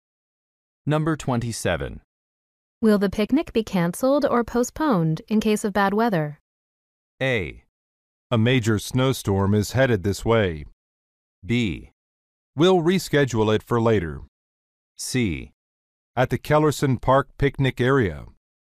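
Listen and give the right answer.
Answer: B: We'll reschedule it for later.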